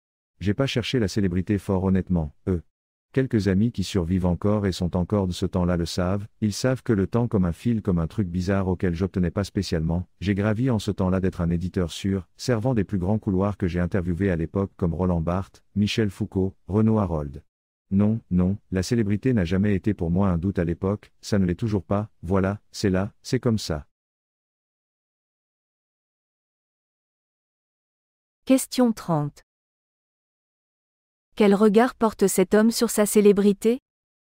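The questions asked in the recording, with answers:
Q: Quel regard porte cet homme sur sa célébrité ?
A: Il ne l'a pas cherchée ; elle ne l'a jamais intéressé (indifférence)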